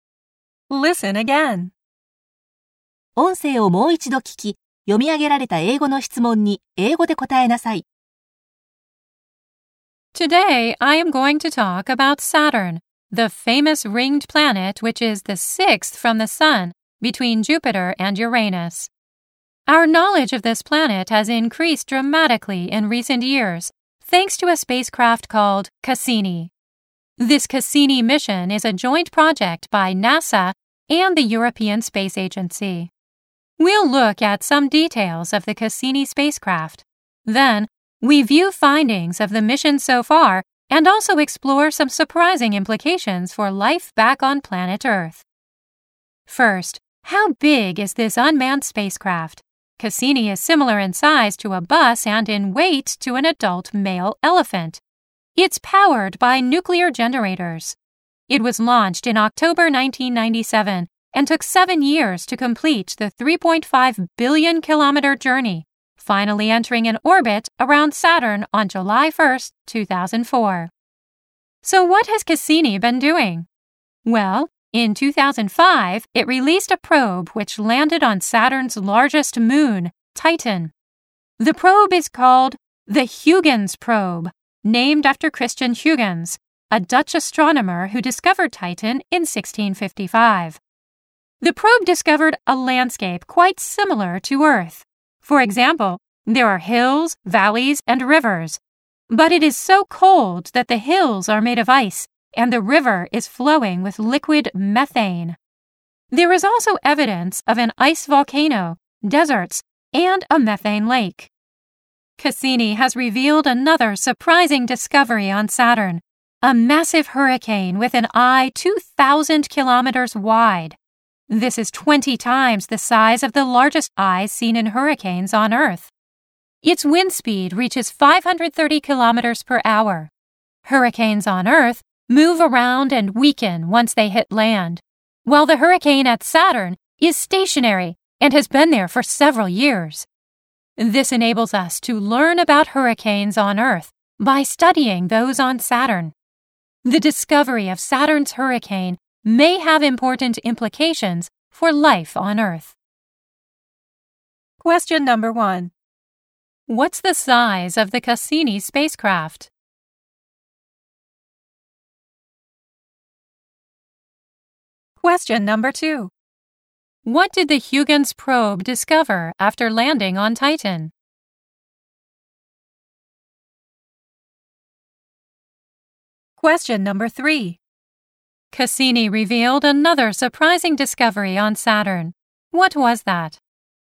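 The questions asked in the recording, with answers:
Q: What's the size of the Cassini spacecraft?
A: It is similar in size to a bus.

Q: What did the Huygens probe discover after landing on Titan?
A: A landscape quite similar to Earth, with hills, valleys and rivers.

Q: Cassini revealed another surprising discovery on Saturn. What was that?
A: A massive hurricane with an eye 2,000 kilometers wide.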